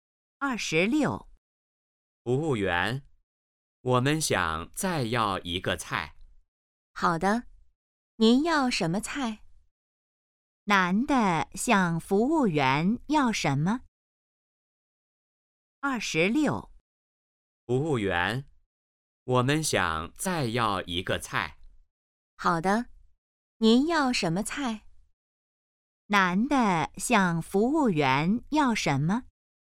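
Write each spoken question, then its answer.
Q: 男的向服务员要什么?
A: 再要一个菜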